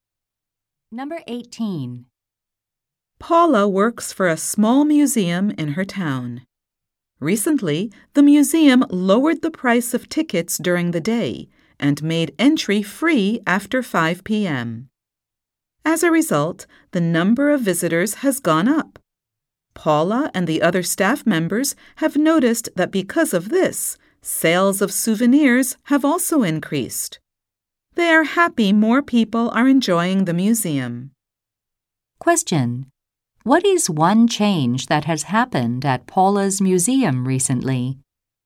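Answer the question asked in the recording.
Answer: Ticket prices were lowered and entry is free after 5 p.m.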